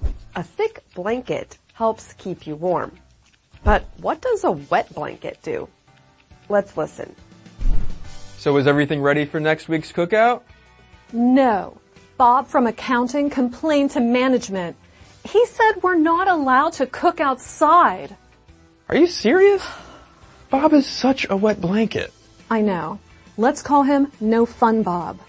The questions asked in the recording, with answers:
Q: But what does a wet blanket do?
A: A wet blanket is someone who says or does things that stop other people from enjoying themselves.